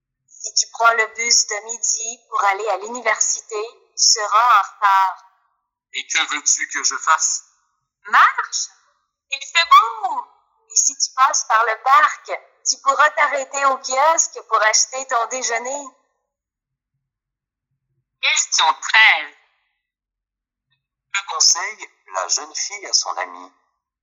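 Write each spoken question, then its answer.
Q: Que conseille la jeune fille à son amie?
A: D'aller à pied (en passant par le parc)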